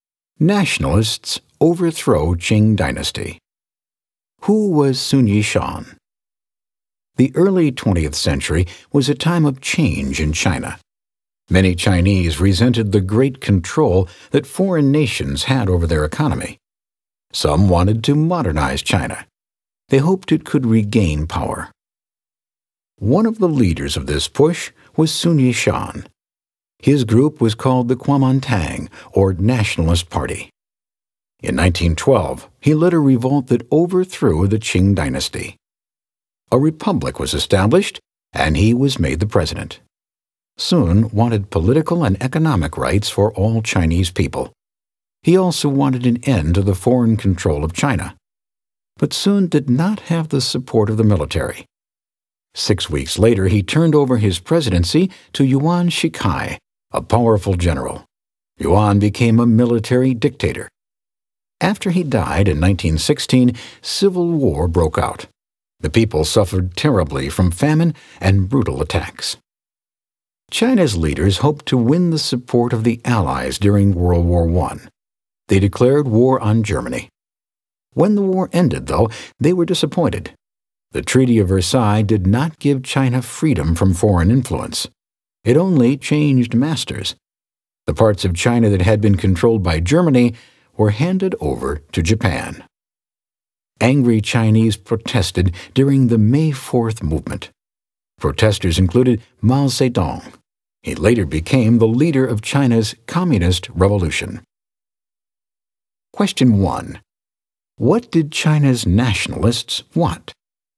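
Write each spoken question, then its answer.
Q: What did China's nationalists want?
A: To modernize China, end foreign control, and gain political and economic rights for all Chinese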